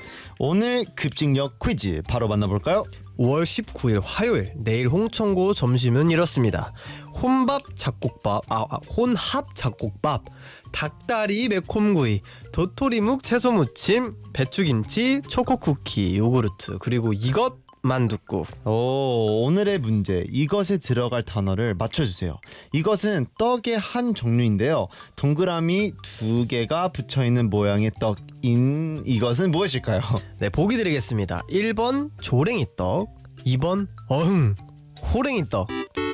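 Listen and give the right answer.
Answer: 1: 조랭이떡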